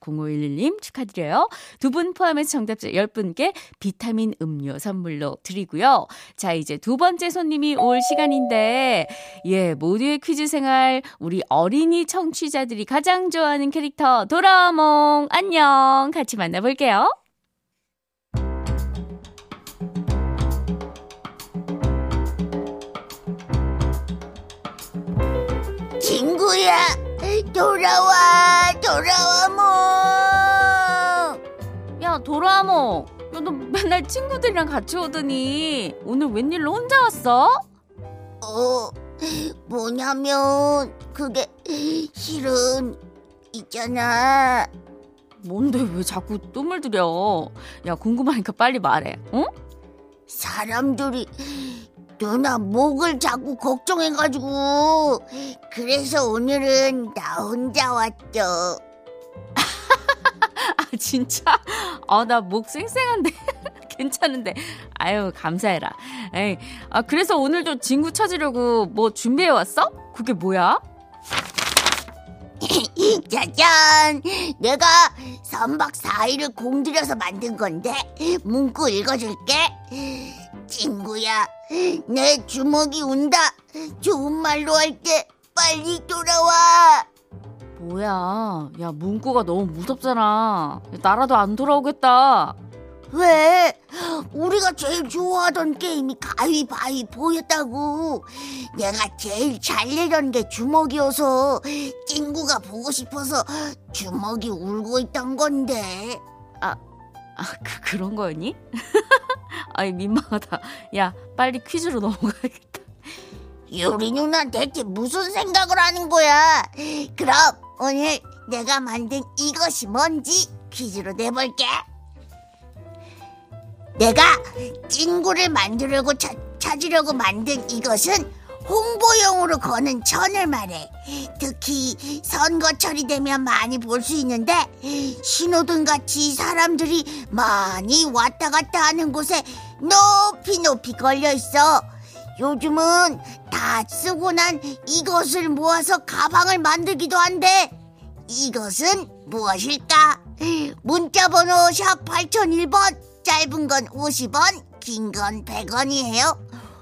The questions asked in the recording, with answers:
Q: 요즘은 다 쓰고 난 이것을 모아서 가방을 만들기도 한데 이것은 무엇일까?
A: 정답! 현수막이요.